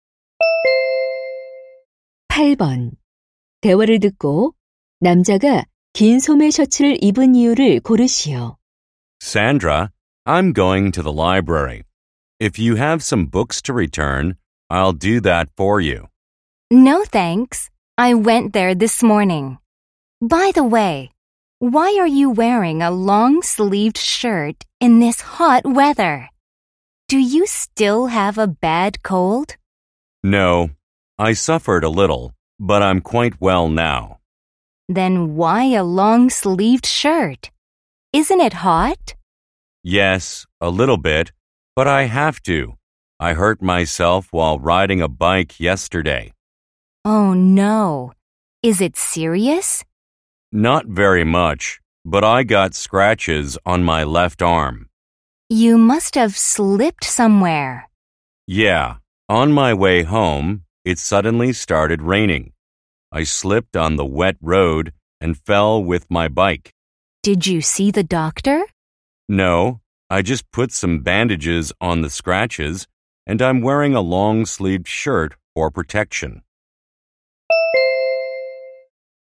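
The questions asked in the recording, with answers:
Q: 긴 소매 셔츠를 입은 이유를 고르시오.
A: 자전거를 타다 넘어져 팔에 긁힌 상처를 보호하려고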